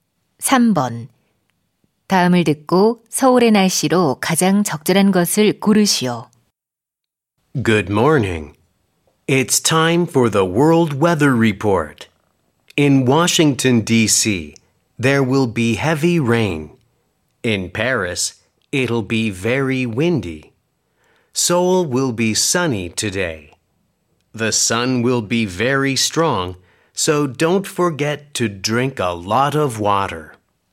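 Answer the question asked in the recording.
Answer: 맑음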